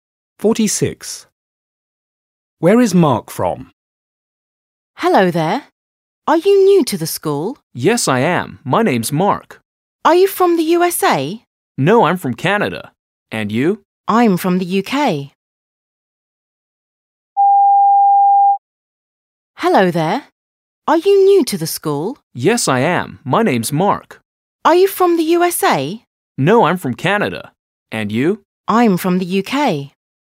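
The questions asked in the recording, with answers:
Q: Where is Mark from?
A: Canada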